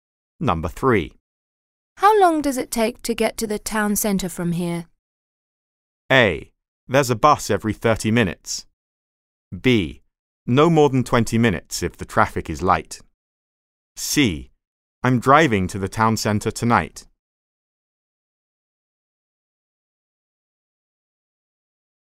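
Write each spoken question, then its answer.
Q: How long does it take to get to the town centre from here?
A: B: No more than 20 minutes if the traffic is light.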